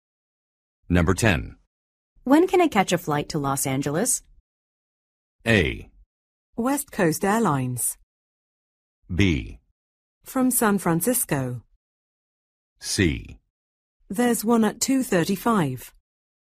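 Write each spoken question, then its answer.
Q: When can I catch a flight to Los Angeles?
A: C: There's one at 2:35.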